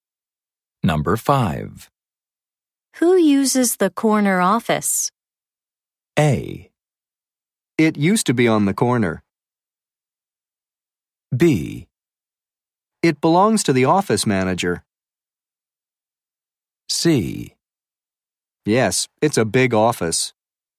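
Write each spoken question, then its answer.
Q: Who uses the corner office?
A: B: It belongs to the office manager.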